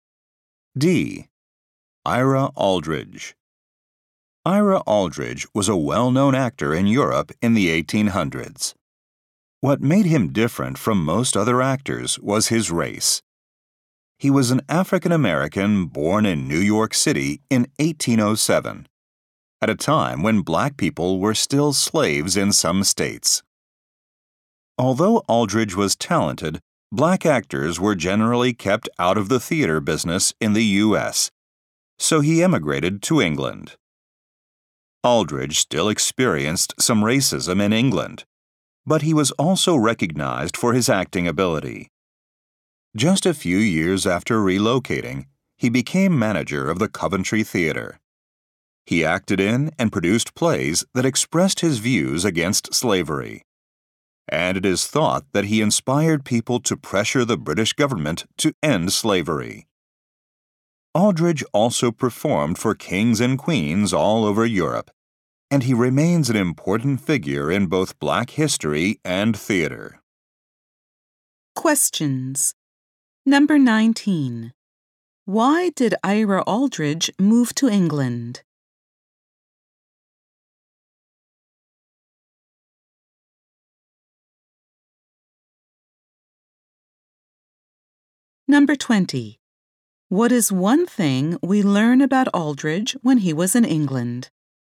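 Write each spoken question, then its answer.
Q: Why did Ira Aldridge move to England?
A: Black actors were generally kept out of the theater business in the U.S.

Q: What is one thing we learn about Aldridge when he was in England?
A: He became manager of the Coventry Theater.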